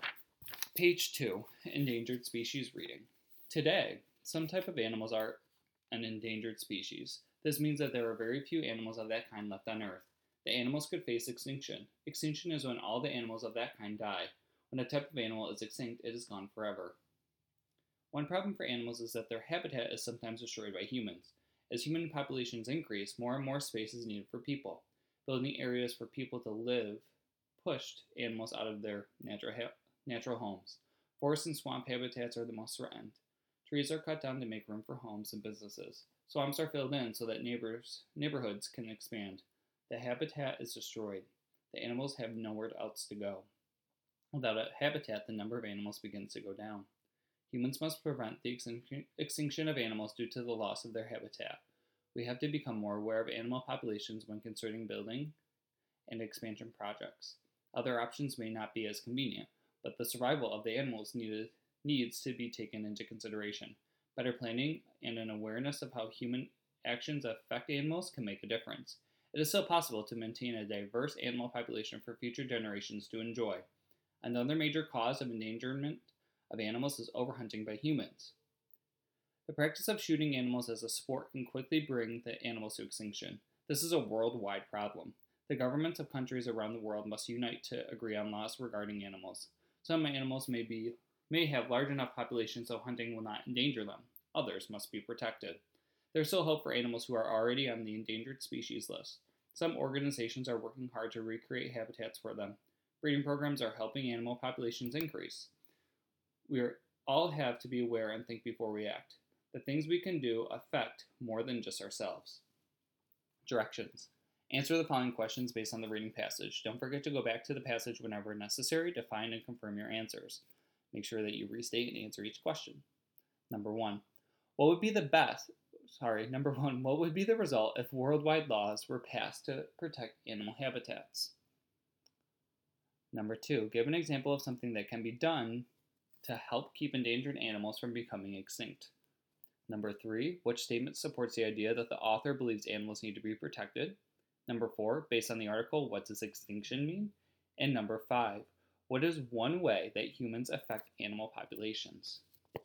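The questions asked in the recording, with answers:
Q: give an example of something that can be done to help keep endangered animals from becoming extinct.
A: Recreating habitats or breeding programs

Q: based on the article, what does extinction mean?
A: When all the animals of that kind die and are gone forever

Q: what is one way that humans affect animal populations?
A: Destroying their habitats or overhunting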